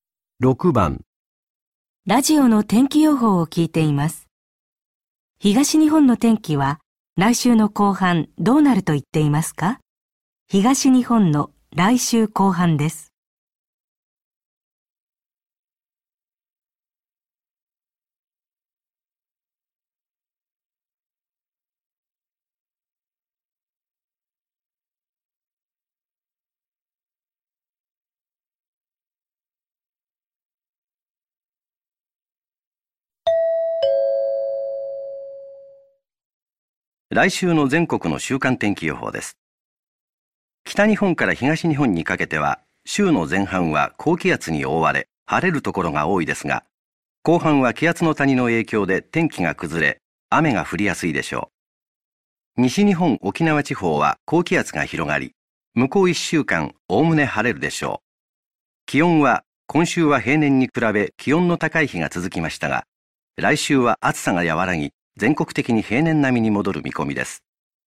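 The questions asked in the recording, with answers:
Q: 東日本の天気は来週の後半どうなると言っていますか?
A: 天気が崩れ、雨が降りやすい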